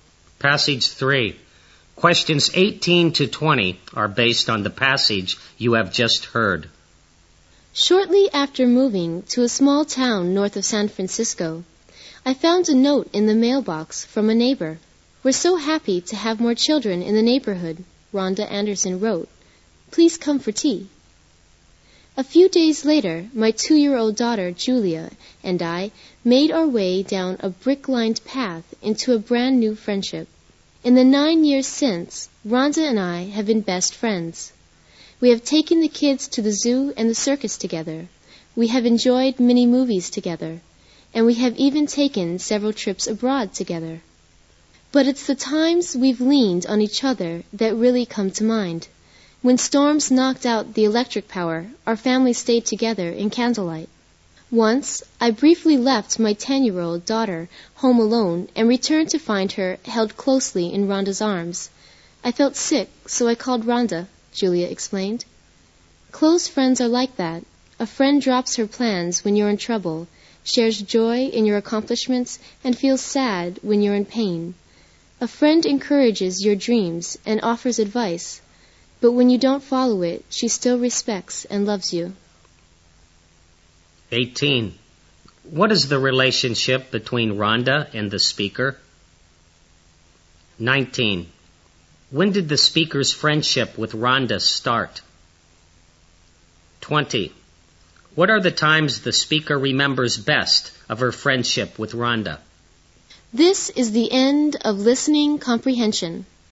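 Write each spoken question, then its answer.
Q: What is the relationship between Rhonda and the speaker?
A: Neighbors and best friends

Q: When did the speaker's friendship with Rhonda start?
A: Shortly after she moved to the town, nine years ago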